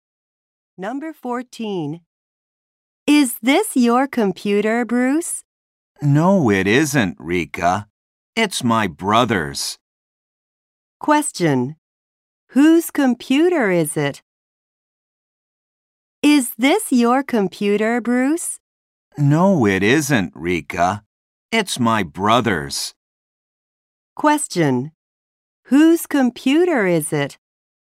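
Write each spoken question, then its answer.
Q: Question. Whose computer is it?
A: Bruce's brother's.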